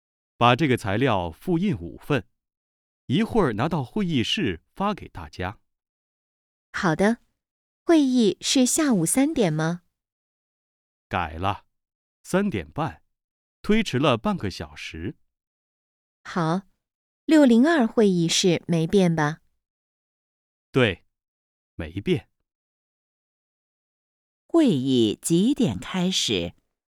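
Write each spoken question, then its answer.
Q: 会议几点开始?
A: 三点半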